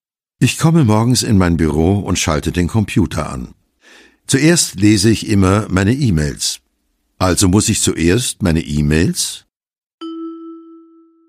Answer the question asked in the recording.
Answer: Abrufen.